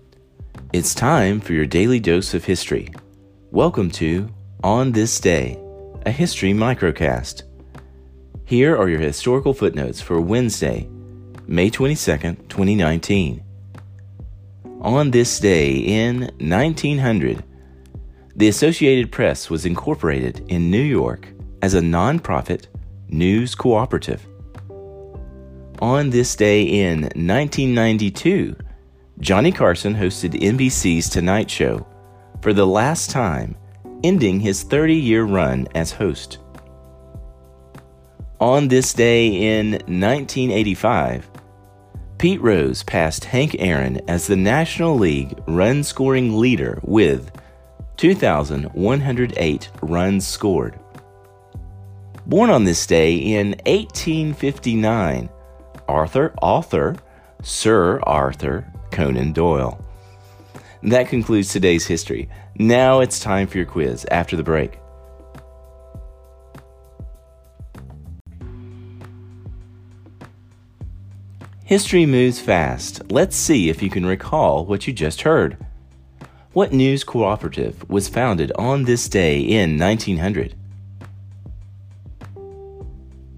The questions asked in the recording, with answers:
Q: What news cooperative was founded on this day in 1900?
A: the Associated Press.